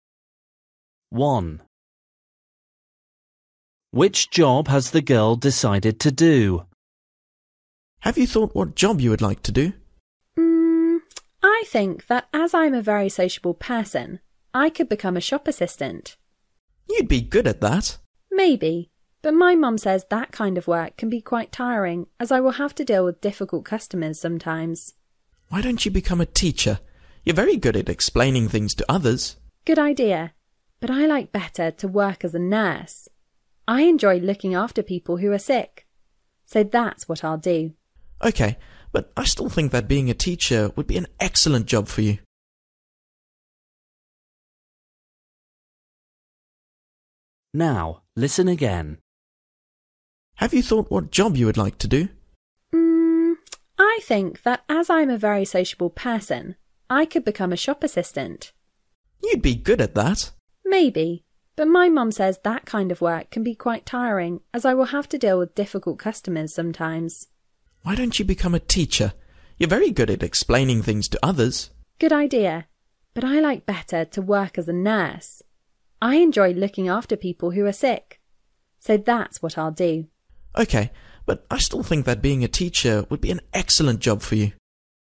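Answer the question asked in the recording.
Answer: a nurse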